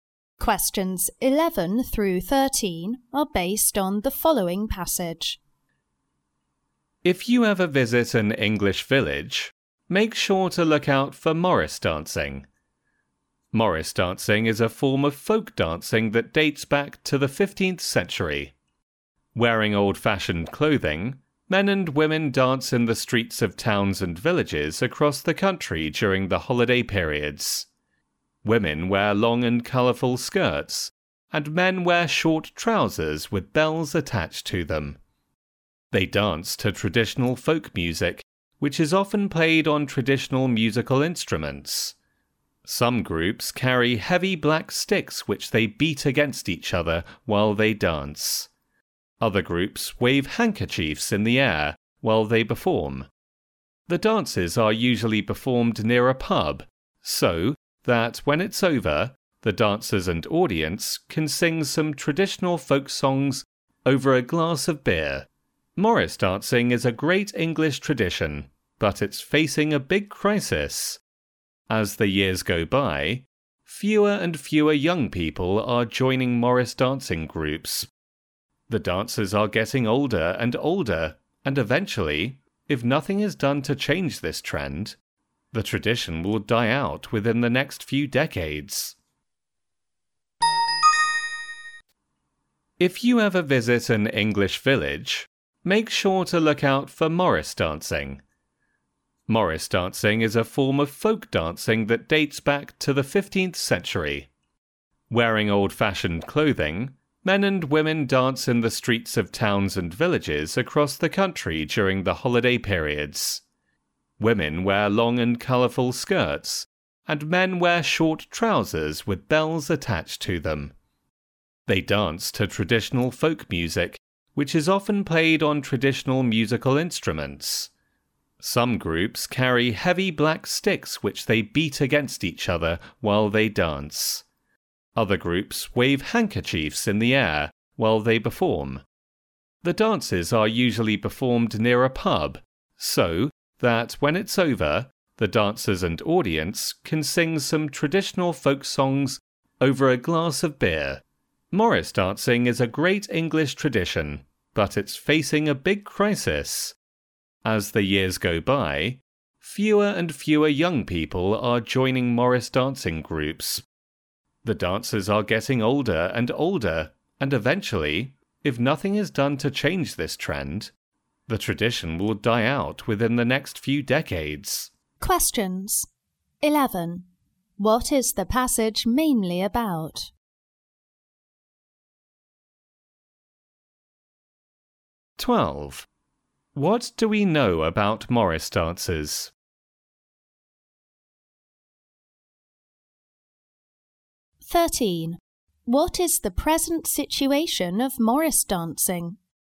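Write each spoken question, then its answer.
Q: What is the passage mainly about?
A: Morris dancing, an English folk dance tradition

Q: What is the present situation of Morris dancing?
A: It faces a crisis as fewer young people join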